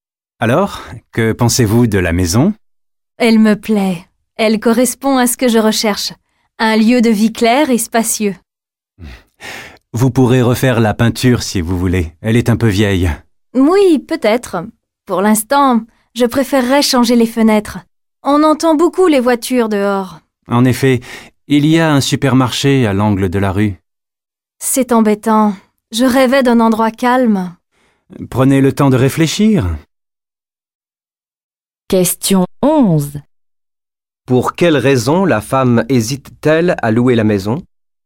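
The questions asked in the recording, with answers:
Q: Pour quelle raison la femme hésite-t-elle à louer la maison ?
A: Parce qu'elle est bruyante : on entend beaucoup les voitures, et elle voulait un endroit calme.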